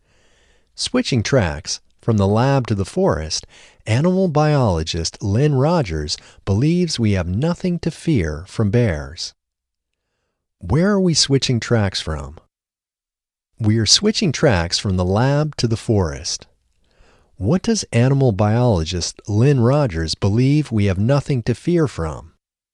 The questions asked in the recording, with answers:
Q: What does animal biologist Lynn Rogers believe we have nothing to fear from?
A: Animal biologist Lynn Rogers believes we have nothing to fear from bears.